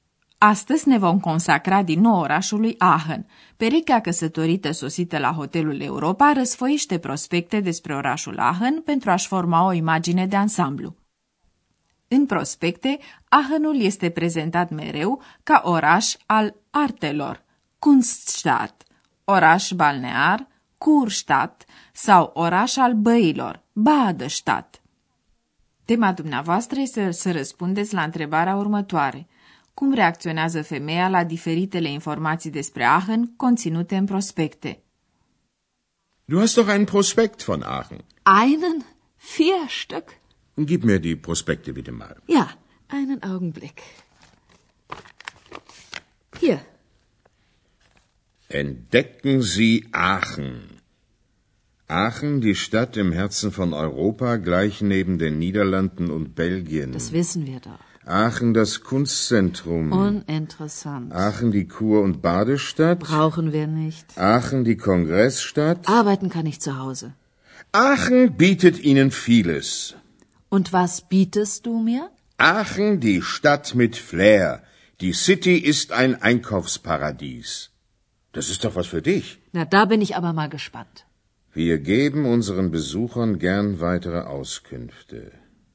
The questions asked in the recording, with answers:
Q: Cum reacționează femeia la diferitele informații despre Aachen conținute în prospecte?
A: Prospectul, așa cum trebuie să facă un prospect, scoate în evidență multitudinea de aspecte ale orașului Aachen, dar femeia nu manifestă prea mult interes.